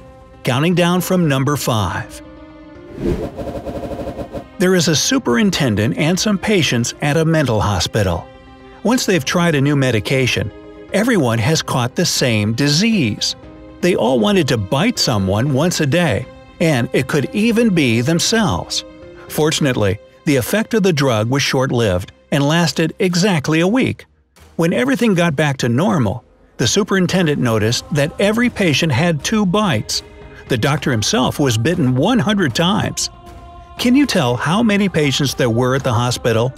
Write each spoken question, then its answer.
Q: Can you tell how many patients there were at the hospital?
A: The correct answer is 20.